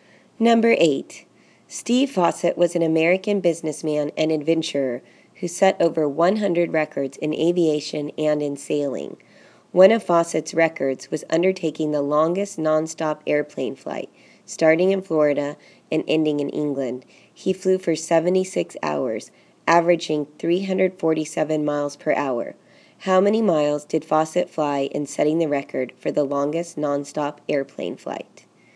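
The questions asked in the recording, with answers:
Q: How many miles did Fawcett fly in setting the record for the longest nonstop airplane flight?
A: 26,372 miles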